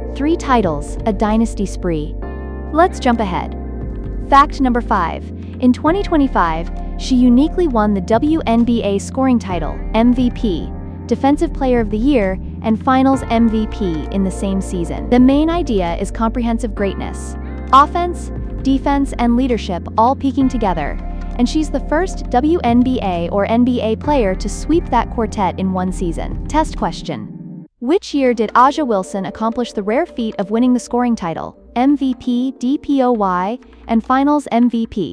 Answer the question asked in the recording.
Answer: Correct answer, 2025.